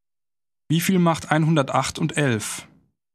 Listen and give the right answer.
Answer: Das macht 119.